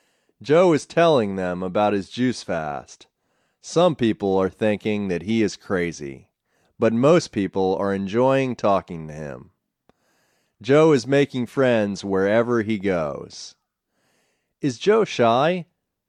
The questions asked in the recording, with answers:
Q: Is Joe shy?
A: No, Joe isn't shy. He is making friends wherever he goes.